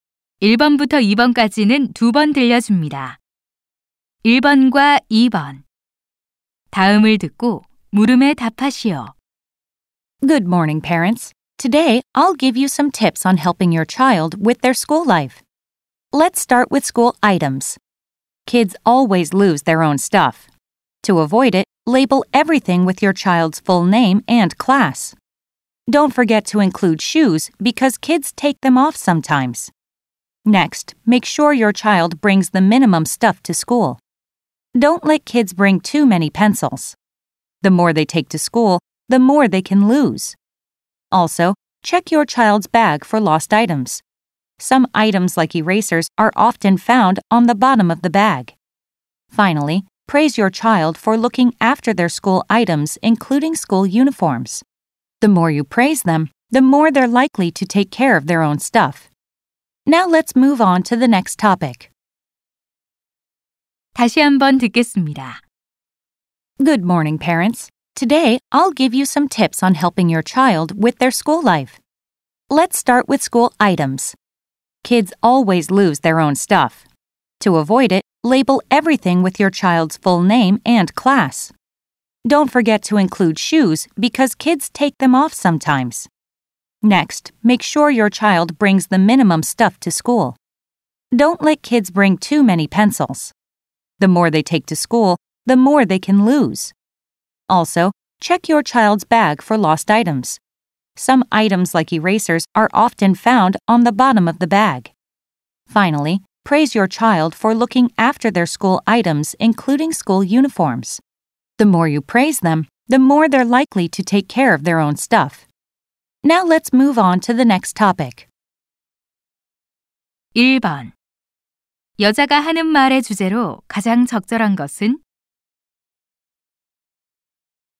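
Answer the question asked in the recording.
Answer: 자녀가 학용품을 잃어버리지 않고 잘 관리하도록 돕는 방법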